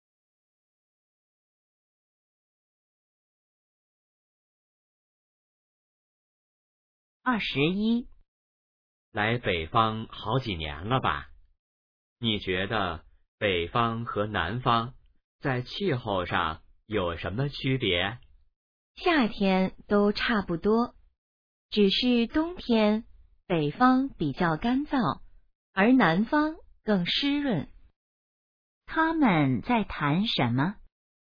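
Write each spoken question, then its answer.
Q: 他们在谈什么?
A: 北方和南方的气候区别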